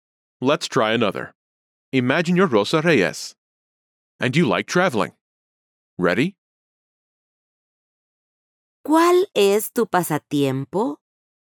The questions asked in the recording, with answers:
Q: ¿Cuál es tu pasatiempo?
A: Me gusta viajar.